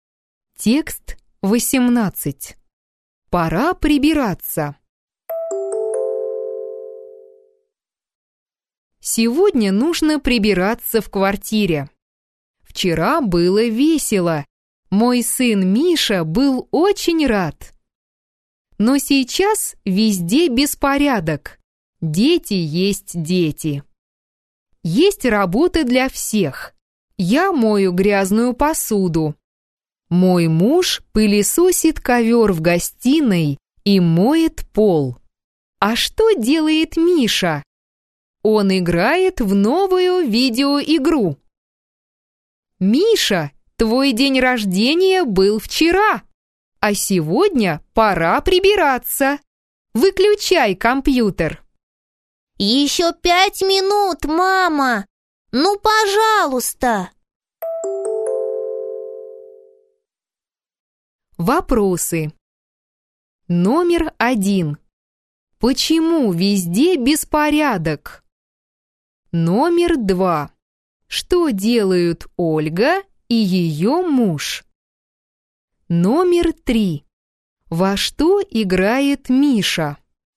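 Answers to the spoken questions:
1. Вчера был день рождения Миши (было весело)
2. Ольга моет посуду, муж пылесосит ковер и моет пол
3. В новую видеоигру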